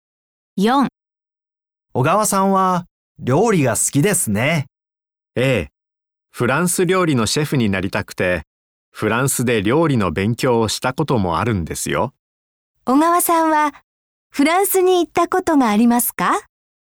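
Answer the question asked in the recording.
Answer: はい、あります。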